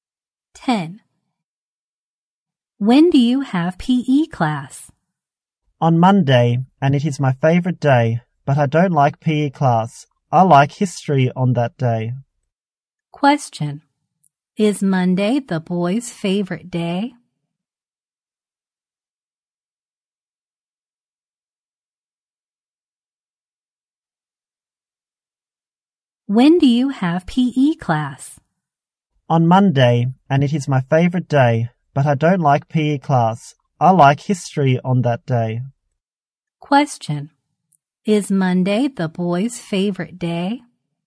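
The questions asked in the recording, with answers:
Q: Question. Is Monday the boy's favorite day?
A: Yes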